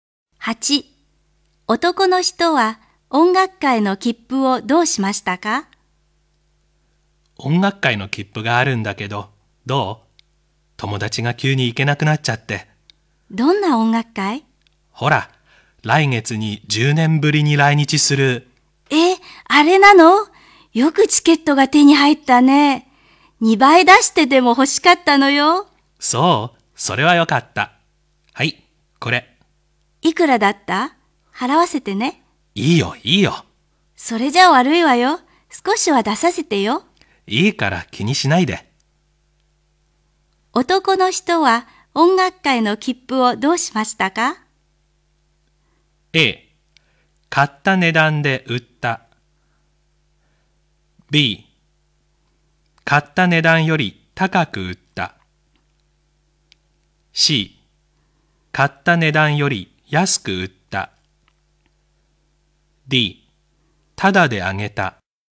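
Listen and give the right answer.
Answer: D: ただであげた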